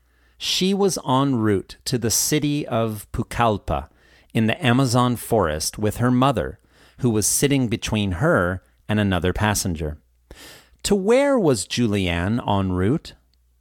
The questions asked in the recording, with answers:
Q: To where was Julianne en route?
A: She was en route to the city of Pucallpa in the Amazon forest.